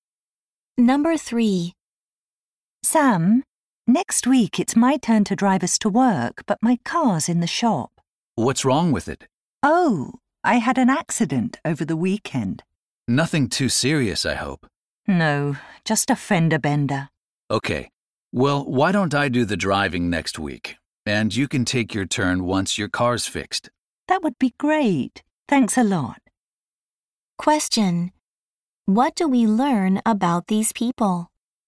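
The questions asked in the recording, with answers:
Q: What do we learn about these people?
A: They carpool to work and take turns driving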